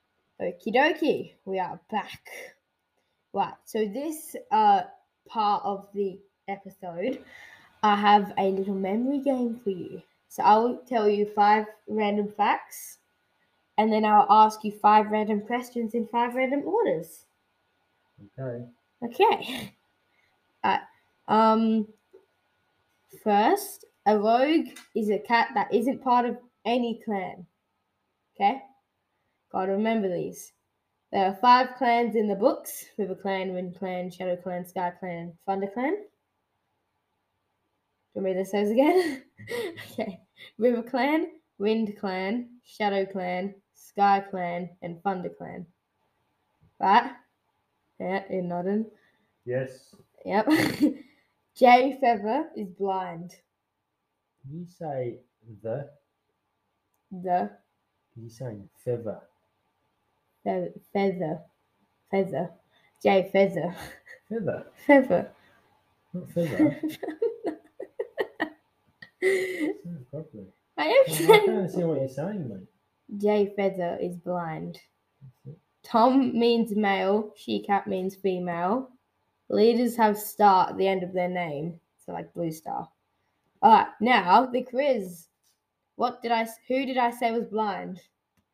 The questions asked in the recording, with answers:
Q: Who did I say was blind?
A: I said Jay Feather was blind.